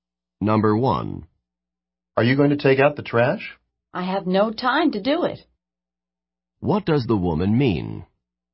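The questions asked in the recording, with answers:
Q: What does the woman mean?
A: She can't take out the trash because she has no time.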